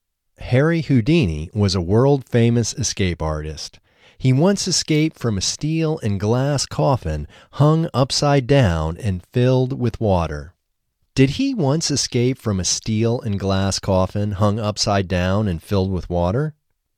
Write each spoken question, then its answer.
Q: Did he once escape from a steel and glass coffin hung upside down and filled with water?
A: Yes, he once escaped from a steel and glass coffin hung upside down and filled with water.